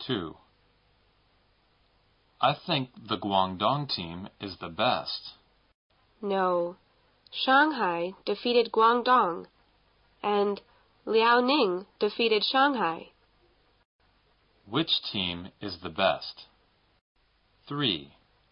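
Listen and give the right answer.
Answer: Liaoning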